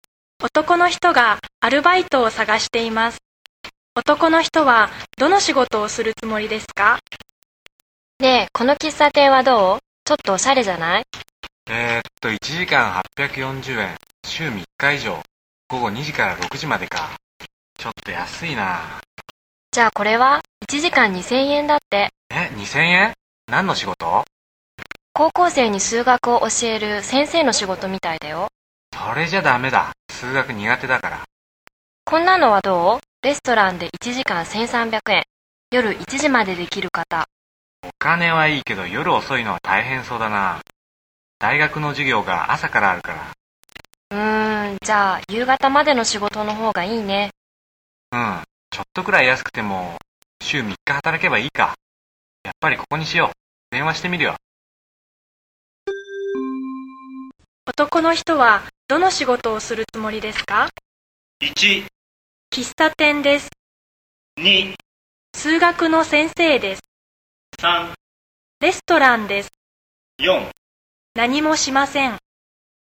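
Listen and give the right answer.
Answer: 1: 喫茶店です。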